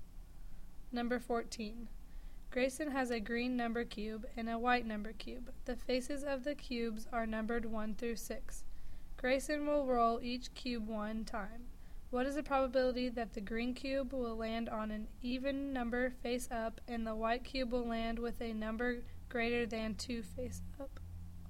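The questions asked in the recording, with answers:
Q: What is the probability that the green cube will land on an even number face up and the white cube will land with a number greater than 2 face up?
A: 1/3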